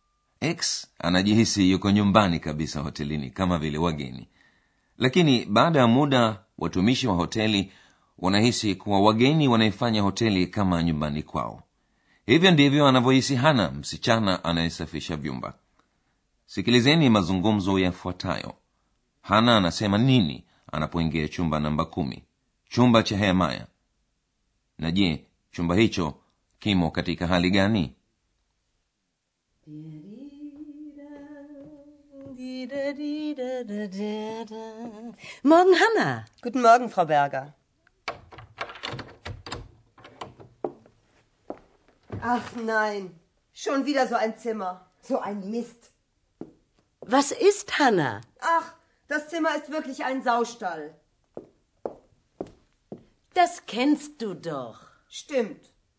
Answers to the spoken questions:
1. tena shonvida anaona chumba ni kichafu
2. anasema chumba kimekaa kama bande la nguruwe